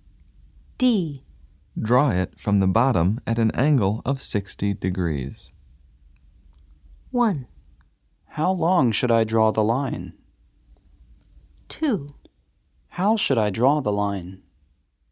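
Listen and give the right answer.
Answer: 2: How should I draw the line?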